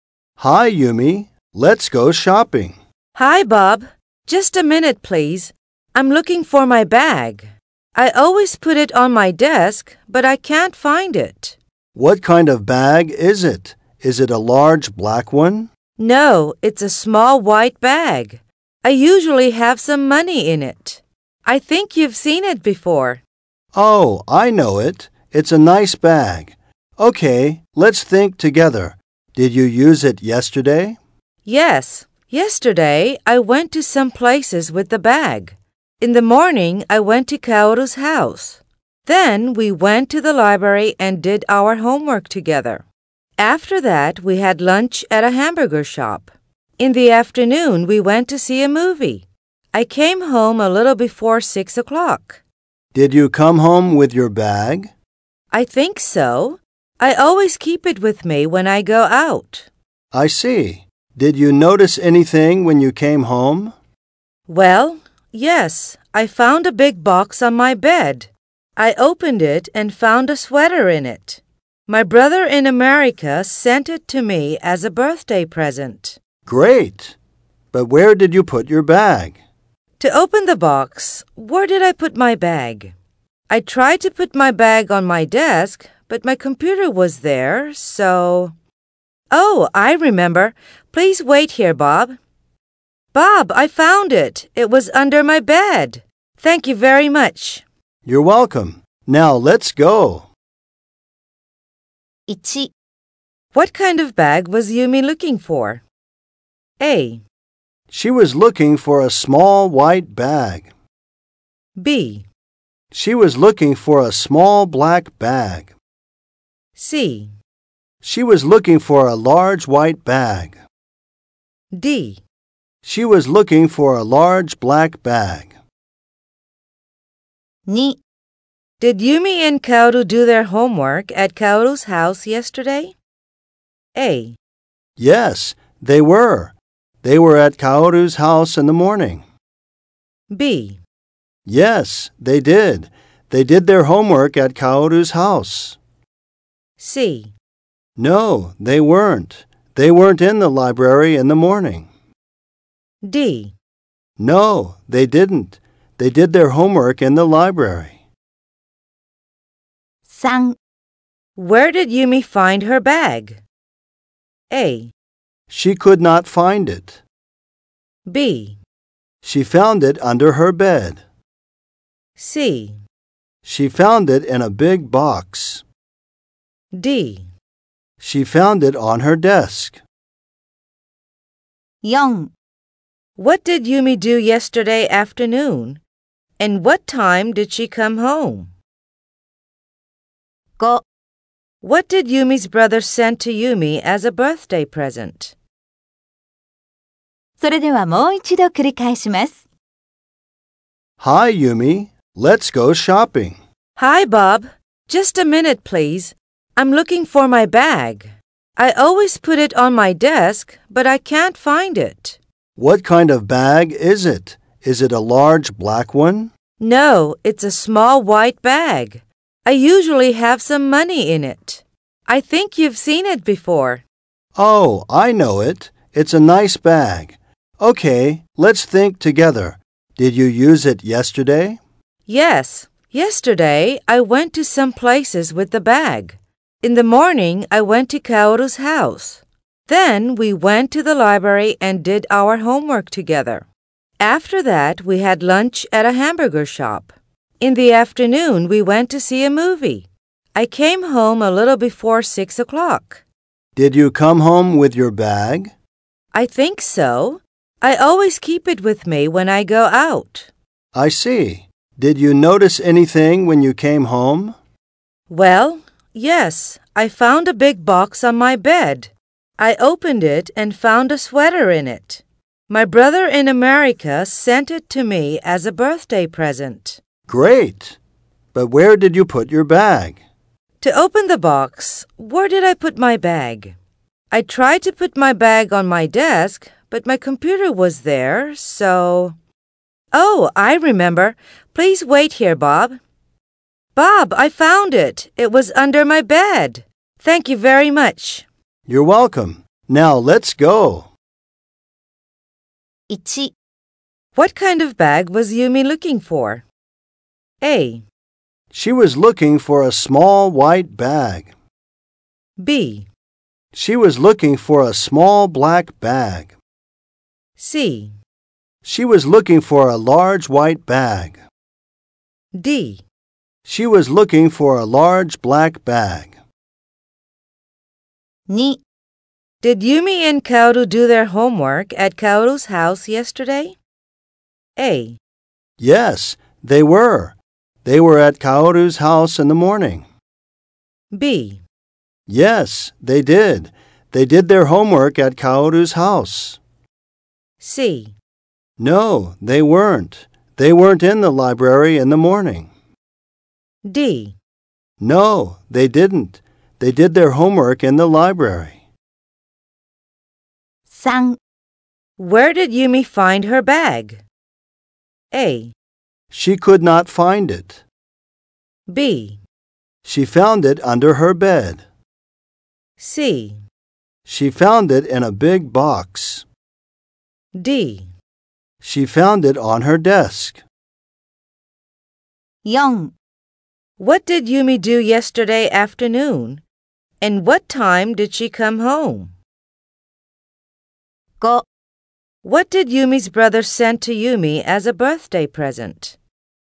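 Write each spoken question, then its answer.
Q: What kind of bag was Yumi looking for?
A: A: She was looking for a small white bag.

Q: Did Yumi and Kaoru do their homework at Kaoru's house yesterday?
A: D: No, they didn't. They did their homework in the library.

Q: Where did Yumi find her bag?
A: B: She found it under her bed.

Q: What did Yumi do yesterday afternoon? And what time did she come home?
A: She went to see a movie and came home a little before 6 o'clock.

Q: What did Yumi's brother send to Yumi as a birthday present?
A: A sweater.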